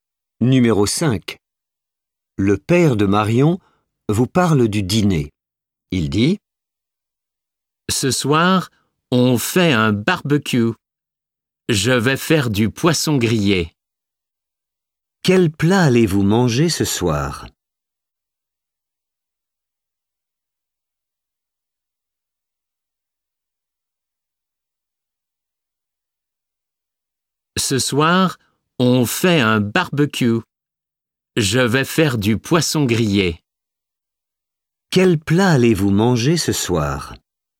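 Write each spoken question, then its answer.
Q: Quel plat allez-vous manger ce soir ?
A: Du poisson grillé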